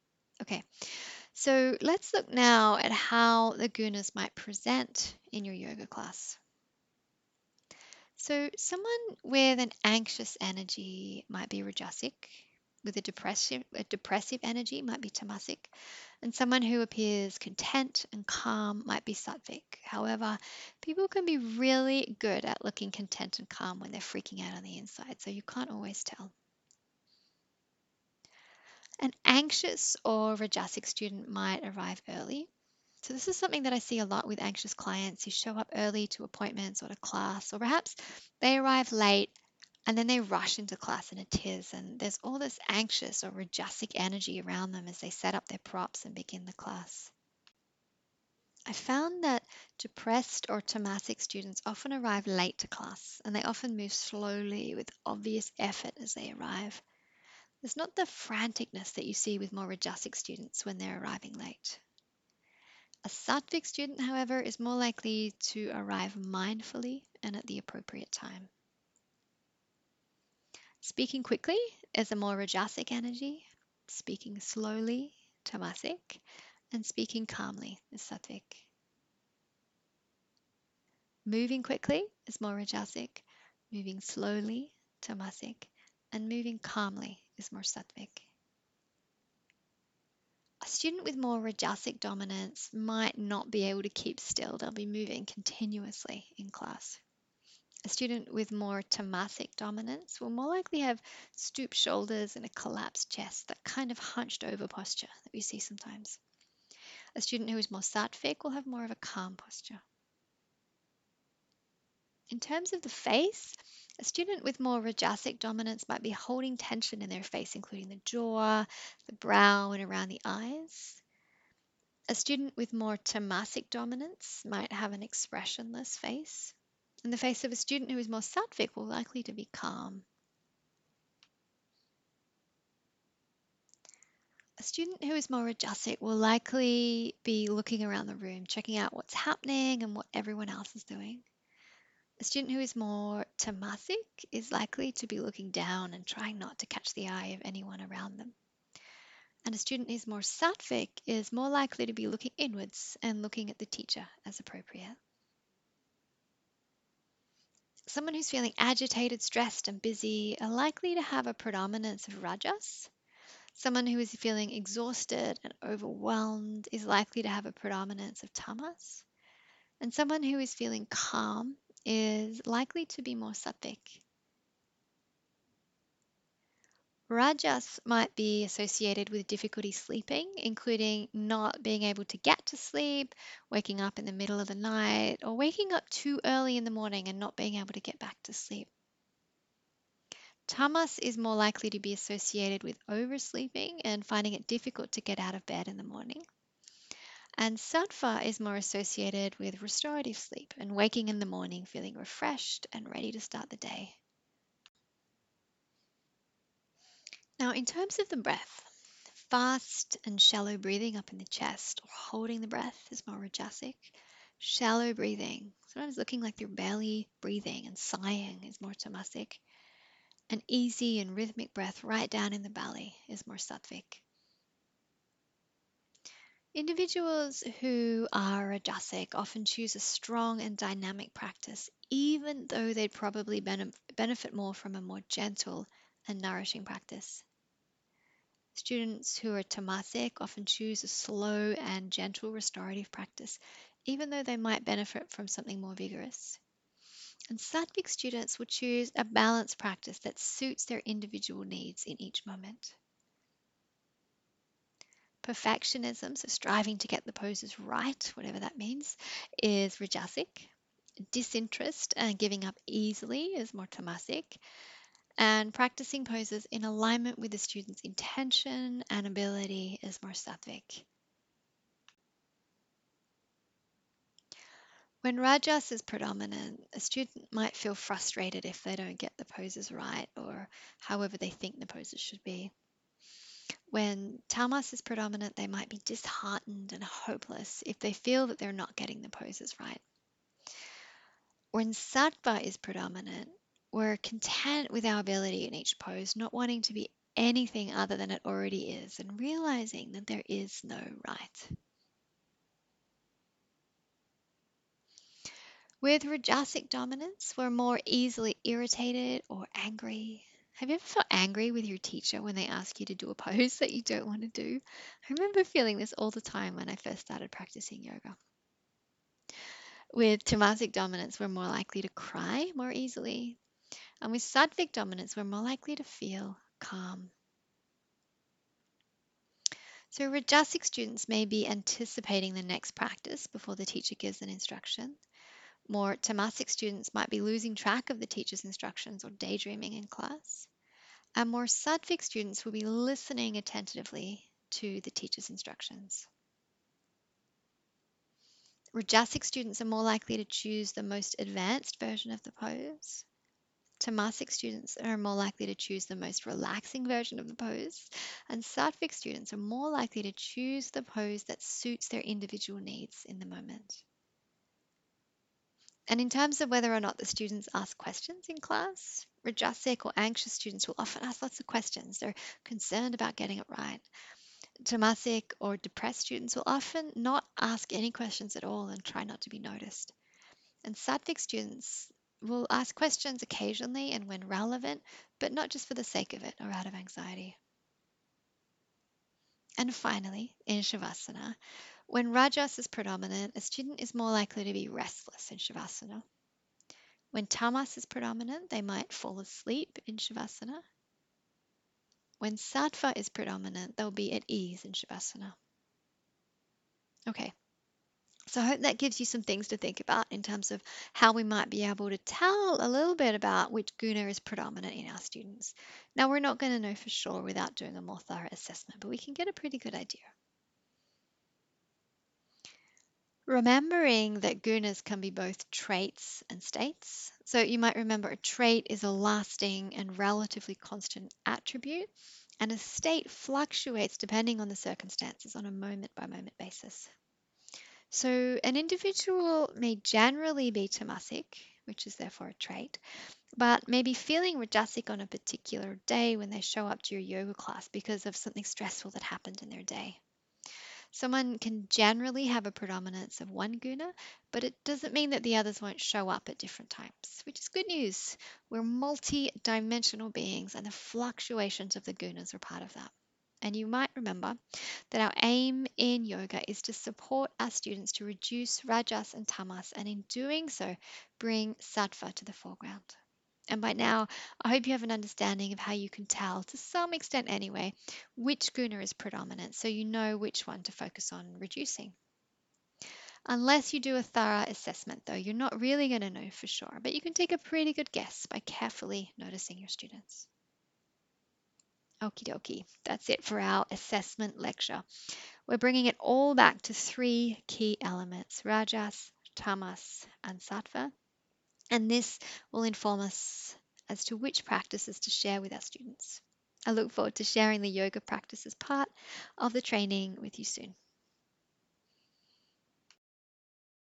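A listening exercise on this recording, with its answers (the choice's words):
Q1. How might you tell if a student has a predominance of rajas?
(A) They have a depressive energy.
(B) Their shoulders are stooped and their chest is collapsed.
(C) They look calm and content.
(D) None of the above.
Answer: None of the above.

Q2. How might you tell if a student has a predominance of tamas?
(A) They look calm, their breath is easy and rhythmic and they arrive at class mindfully and at the appropriate time.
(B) They look exhausted, they look like they're barely breathing, and they arrive late to class, moving slowly and with obvious effort.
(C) They look agitated and stressed, their breath is fast and shallow, and they arrive early to class.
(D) All of the above.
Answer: They look exhausted, they look like they're barely breathing, and they arrive late to class, moving slowly and with obvious effort.

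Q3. How might you tell if a student has a predominance of sattva?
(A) They practice poses in alignment with their intention and ability.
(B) They have a content and calm energy.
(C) They seem at ease in śavāsana.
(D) All of the above.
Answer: All of the above.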